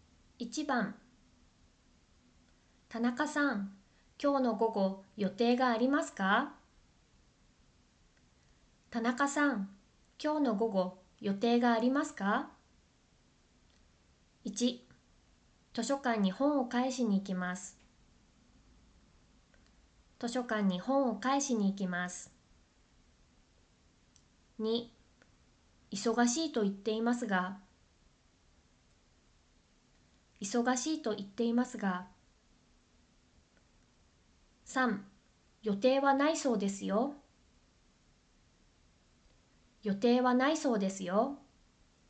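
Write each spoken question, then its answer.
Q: 田中さん、今日の午後予定がありますか?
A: 1: 図書館に本を返しに行きます。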